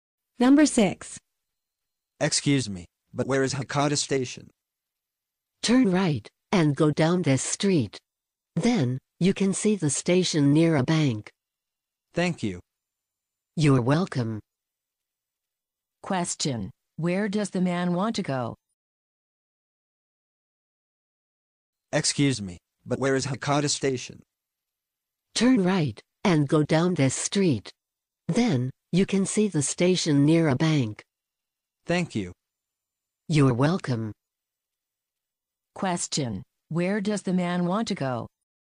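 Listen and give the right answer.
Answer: Hakata Station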